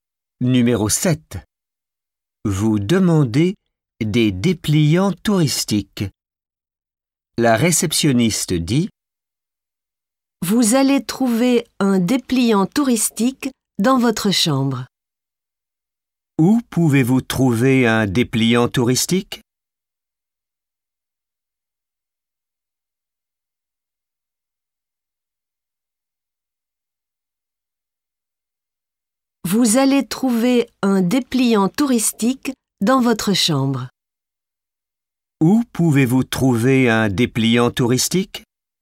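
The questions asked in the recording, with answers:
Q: Où pouvez-vous trouver un dépliant touristique ?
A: Dans votre chambre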